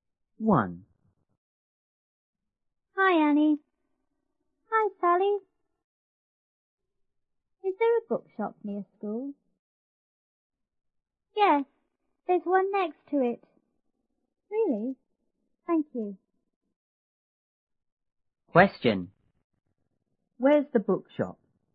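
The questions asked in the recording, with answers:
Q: Where's the bookshop?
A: Next to the school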